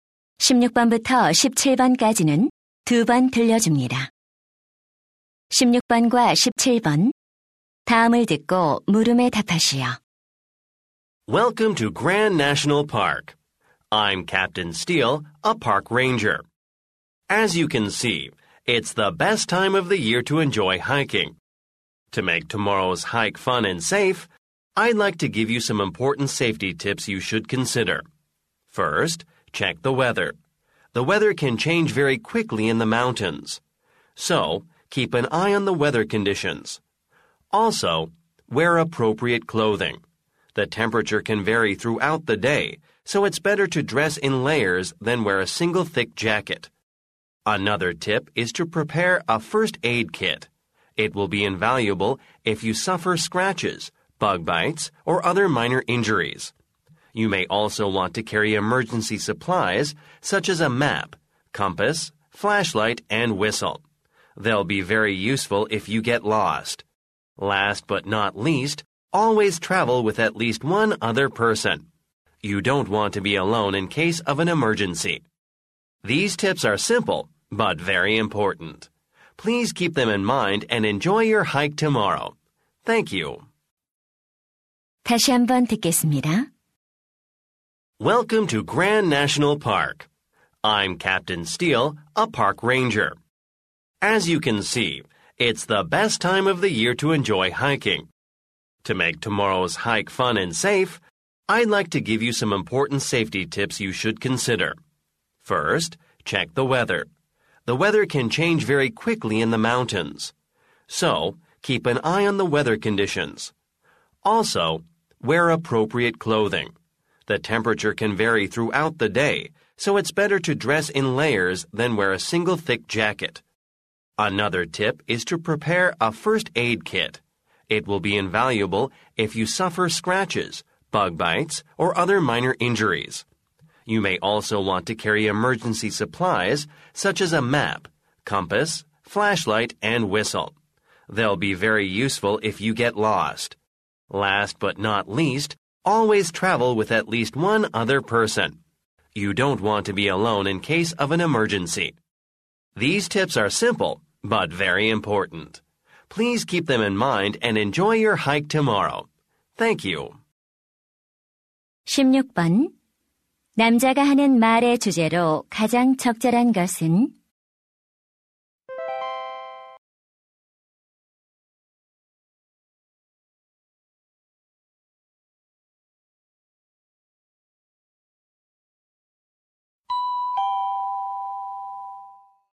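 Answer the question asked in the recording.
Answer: 안전한 하이킹을 위한 수칙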